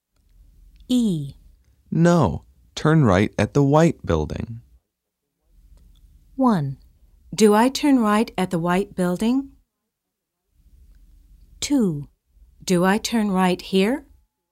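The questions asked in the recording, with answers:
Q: No, turn right at the white building.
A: 2: Do I turn right here?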